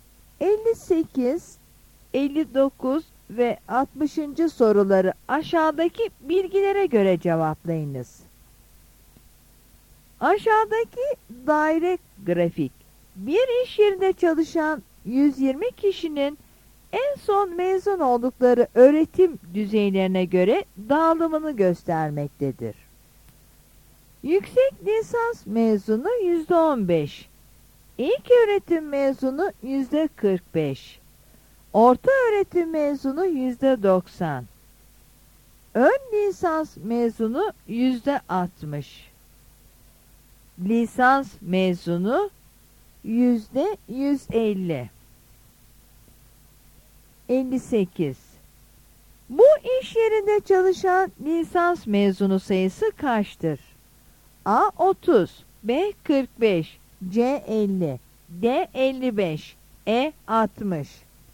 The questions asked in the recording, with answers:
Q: Bu iş yerinde çalışan lisans mezunu sayısı kaçtır?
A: Yanıt C'dir.